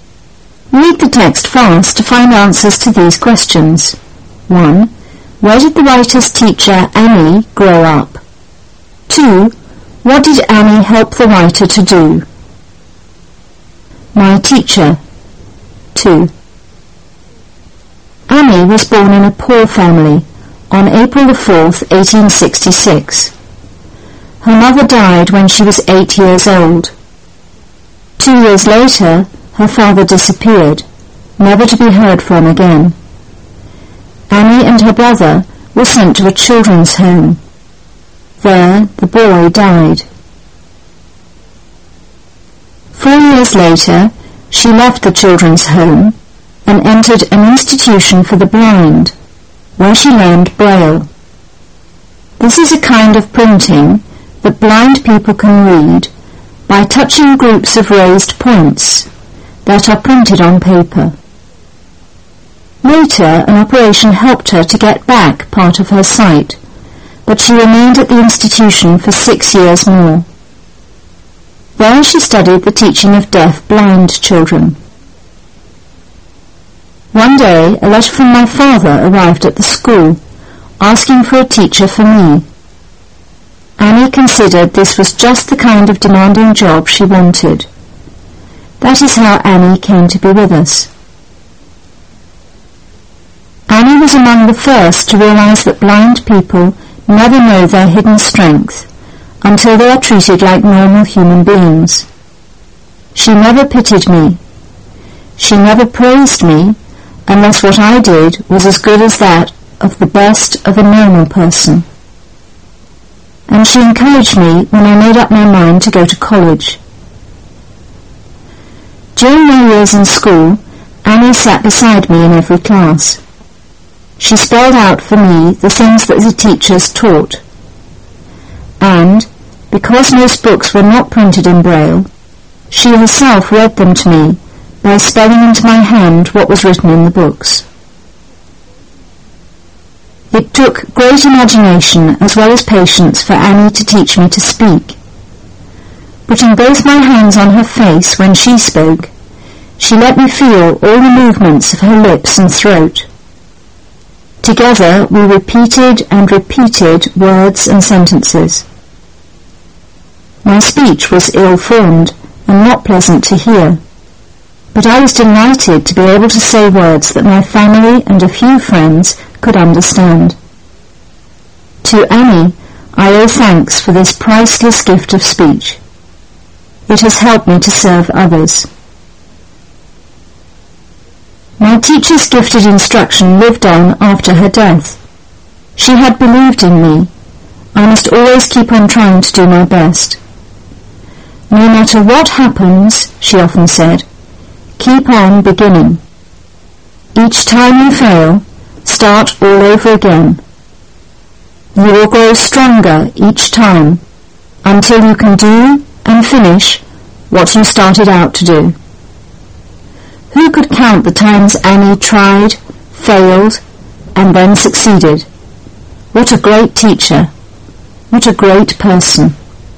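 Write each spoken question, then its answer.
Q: What did Annie help the writer to do?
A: To speak, and to study at school and college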